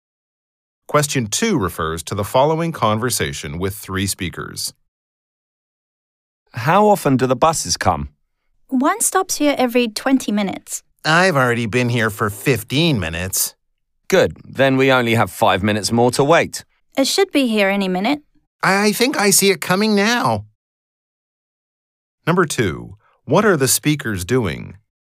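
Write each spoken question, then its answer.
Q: What are the speakers doing?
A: Waiting for a bus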